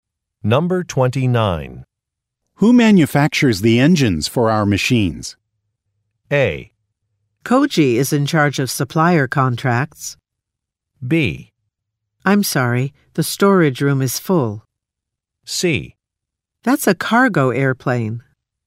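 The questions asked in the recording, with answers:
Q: Who manufactures the engines for our machines?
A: A: Koji is in charge of supplier contracts.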